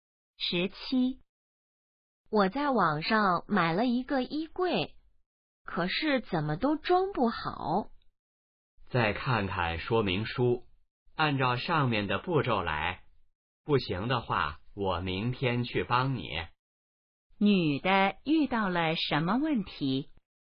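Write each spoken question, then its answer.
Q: 女的遇到了什么问题?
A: 网上买的衣柜装不好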